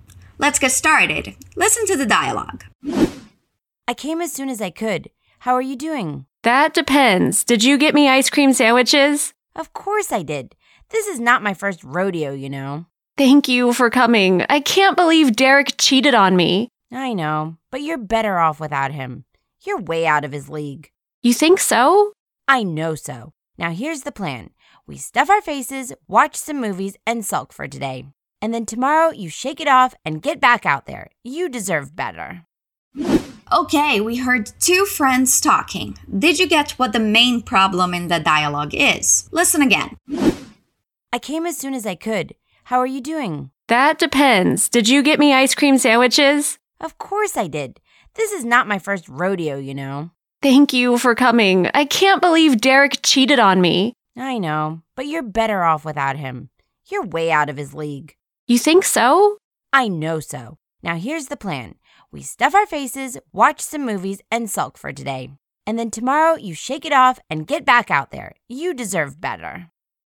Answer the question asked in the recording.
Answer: Our main problem is that one of the girls just went through a bad breakup, so she recently ended a relationship.